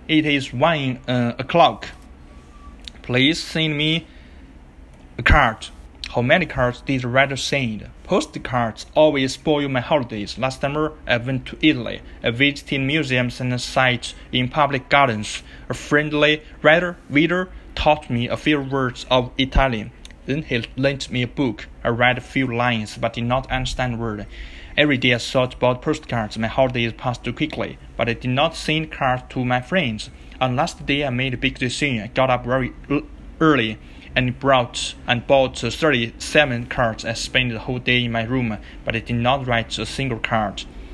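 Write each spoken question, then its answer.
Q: How many cards did the writer send?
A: None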